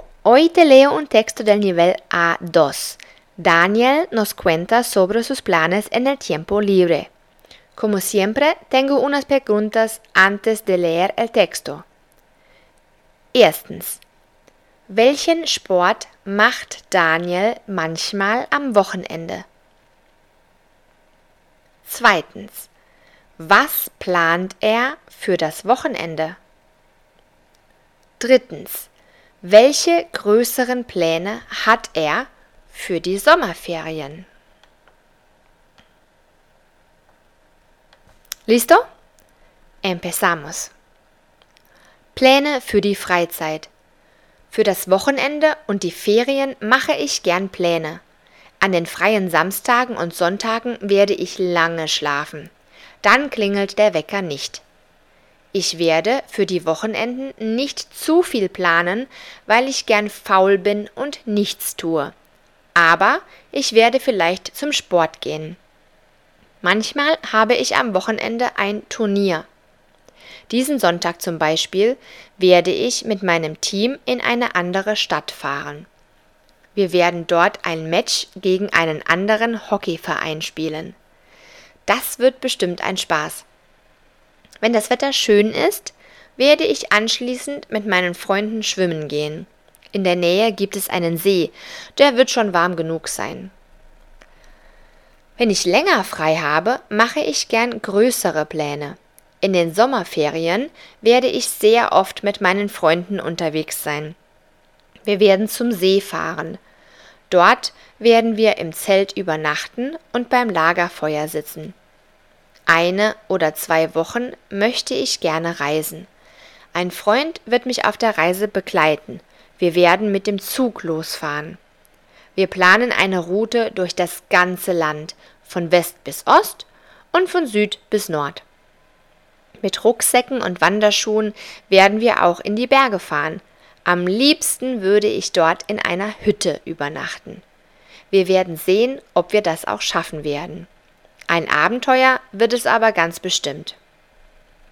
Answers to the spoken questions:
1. Er spielt Hockey.
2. Er wird mit seinen Freunden am See schwimmen.
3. Er will durch Deutschland reisen.